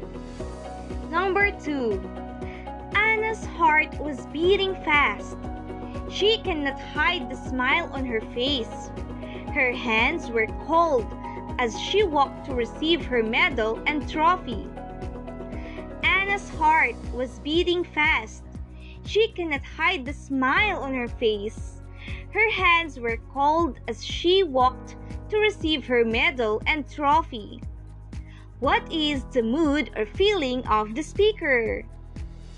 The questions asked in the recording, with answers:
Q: What is the mood or feeling of the speaker?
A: Yes, the speaker's mood or feeling is happy.